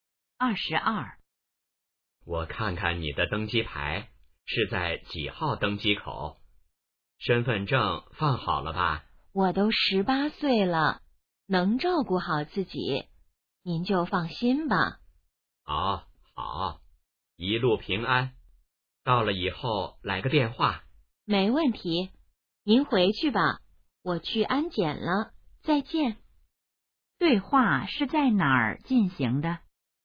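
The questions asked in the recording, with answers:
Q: 对话是在哪儿进行的?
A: 机场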